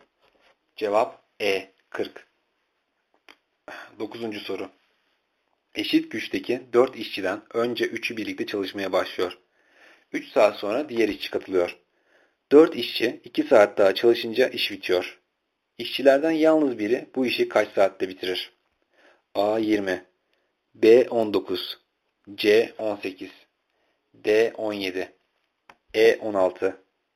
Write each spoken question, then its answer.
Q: İşçilerden yalnız biri bu işi kaç saatte bitirir?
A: Cevap D 17.